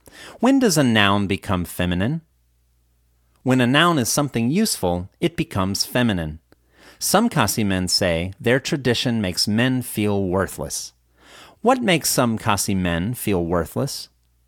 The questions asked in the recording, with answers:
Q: What makes some Khasi men feel worthless?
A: Some Khasi men say that their tradition makes men feel worthless.